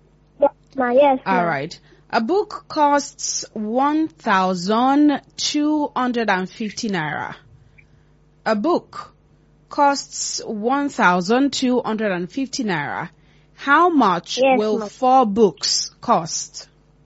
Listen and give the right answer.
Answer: 5,000 naira. That is correct.